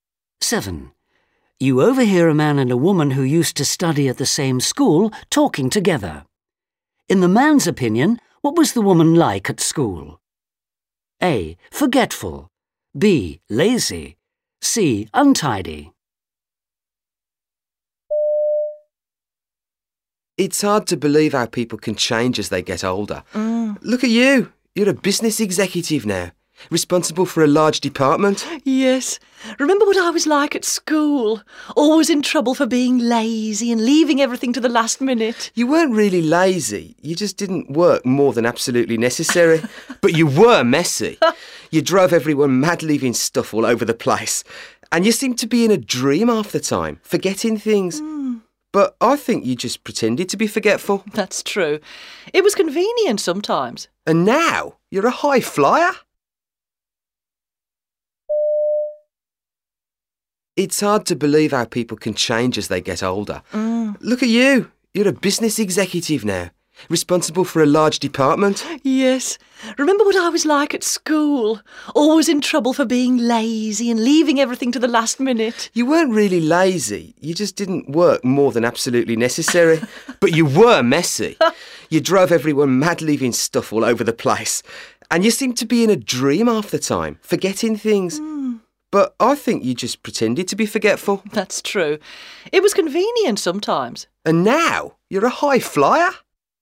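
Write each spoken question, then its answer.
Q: In the man's opinion, what was the woman like at school?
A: C: Untidy.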